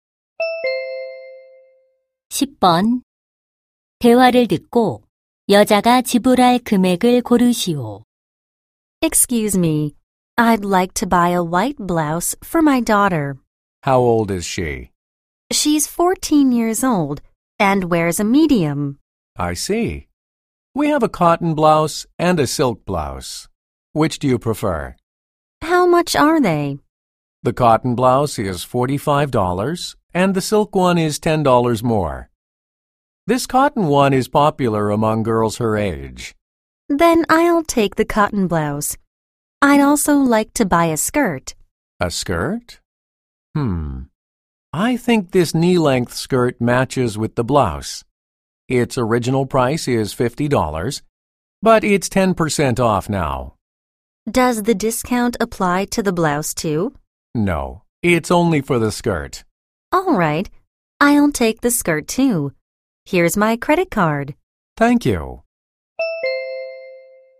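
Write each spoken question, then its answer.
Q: 대화를 듣고 여자가 지불할 금액을 고르시오.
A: $90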